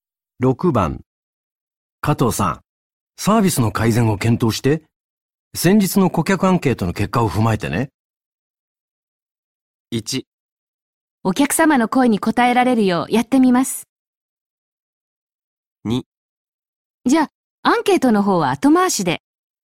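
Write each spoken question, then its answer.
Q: 加藤さん、サービスの改善を検討して、先日の顧客アンケートの結果を踏まえてね。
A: 1: お客様の声に応えられるようやってみます。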